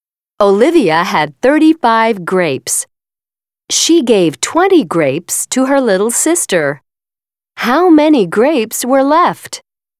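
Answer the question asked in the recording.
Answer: 15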